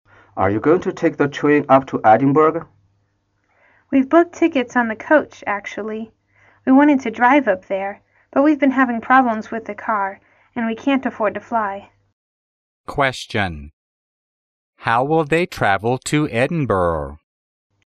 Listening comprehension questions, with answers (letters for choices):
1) How will they travel to Edinburgh?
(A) By plane.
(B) By coach.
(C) By train.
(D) By car.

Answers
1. B

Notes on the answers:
对话中女士提到We've booked tickets on the coach,所以他们决定by coach。

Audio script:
M: Are you going to take the train up to Edinburgh?
W: We've booked tickets on the coach, actually. We wanted to drive up there, but we've been having problems with the car and we can't afford to fly.
Question: How will they travel to Edinburgh?